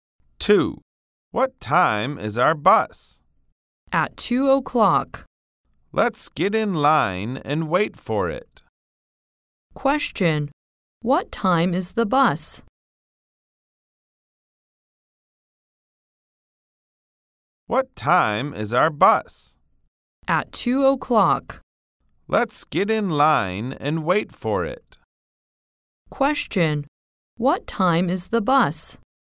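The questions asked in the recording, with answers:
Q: Question. What time is the bus?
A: At 2 o'clock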